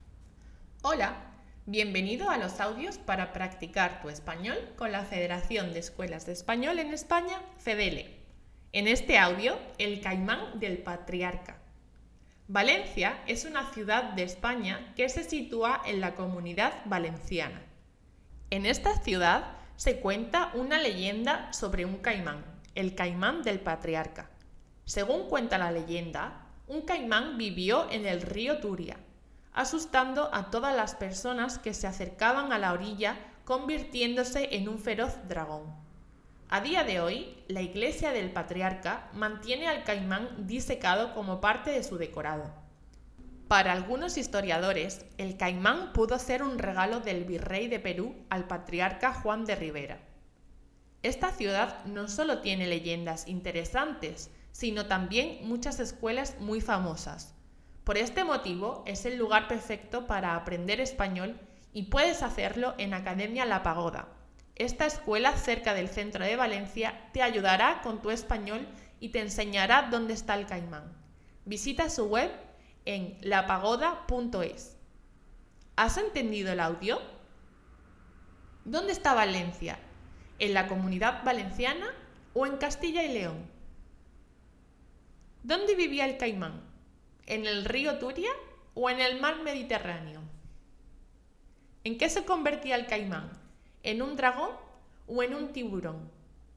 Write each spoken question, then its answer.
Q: ¿Dónde está Valencia?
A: la comunidad valenciana

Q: ¿Dónde vivía el caimán? en el río Turia o en el mar Mediterráneo?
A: el río Turia

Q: ¿En qué se convertía el caimán?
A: en un dragón